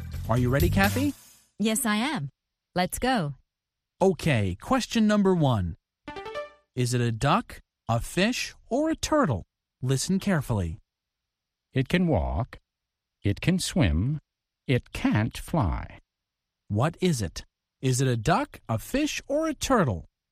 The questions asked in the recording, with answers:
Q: What is it? Is it a duck, a fish, or a turtle?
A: It's a turtle. A turtle can walk and swim, but it can't fly.